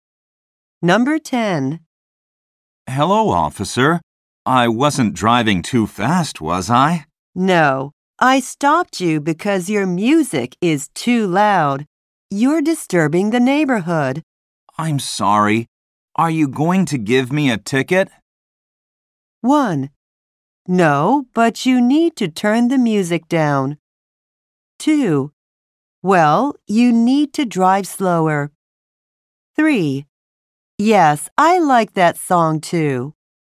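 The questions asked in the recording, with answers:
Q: I'm sorry. Are you going to give me a ticket?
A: 1: No, but you need to turn the music down.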